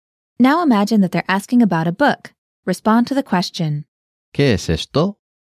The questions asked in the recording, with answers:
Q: ¿Qué es esto?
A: Es un libro.